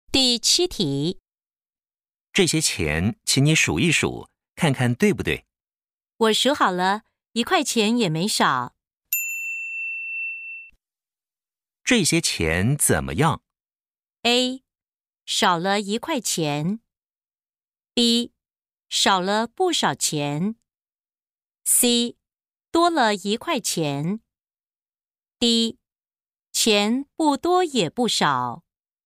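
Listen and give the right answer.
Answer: D: 钱不多也不少。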